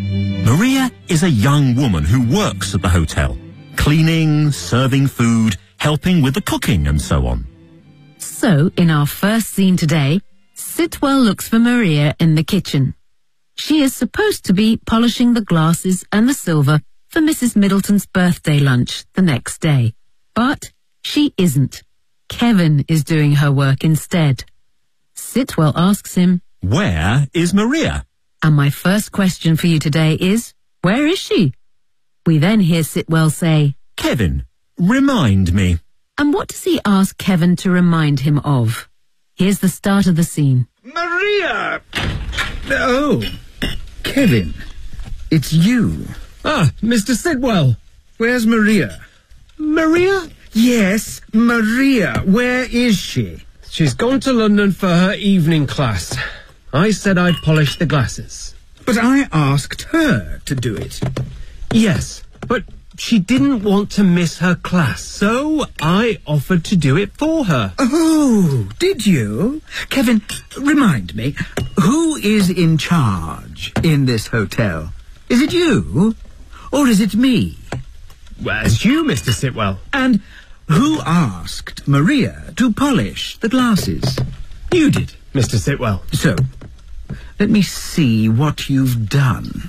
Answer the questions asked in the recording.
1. She's gone to London for her evening class.
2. Kevin, remind me, who is in charge in this hotel?